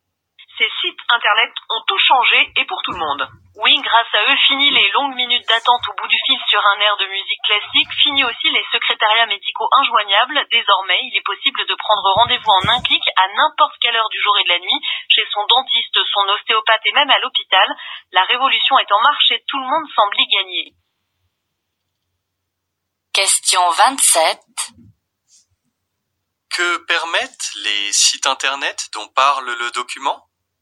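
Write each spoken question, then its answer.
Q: Que permettent les sites internet dont parle le document ?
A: Prendre rendez-vous médical en un clic, à toute heure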